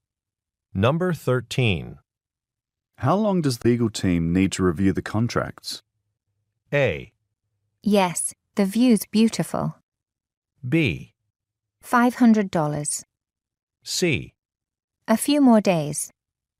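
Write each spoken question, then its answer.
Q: How long does the legal team need to review the contracts?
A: C: A few more days.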